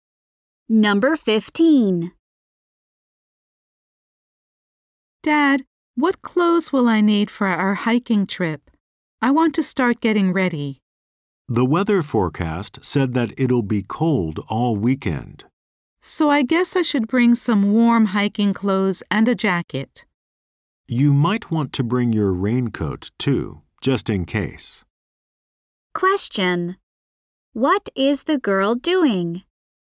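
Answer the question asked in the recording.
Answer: Getting ready for a hiking trip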